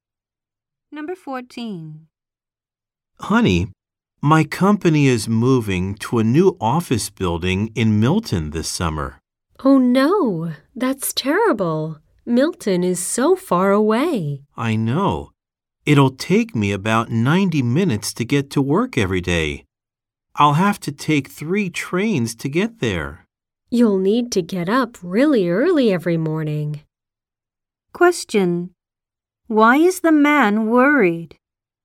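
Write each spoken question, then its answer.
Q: Why is the man worried?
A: His commute will be long because his office is moving far away.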